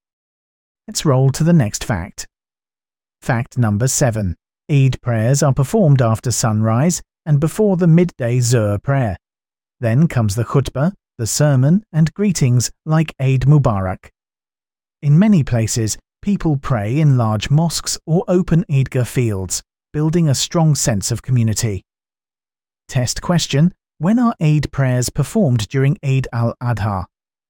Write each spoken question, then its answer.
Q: When are Eid prayers performed during Eid al-Adha?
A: After sunrise and before Zuhr.